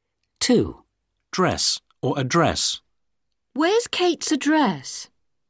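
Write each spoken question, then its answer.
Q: Dress or address.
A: address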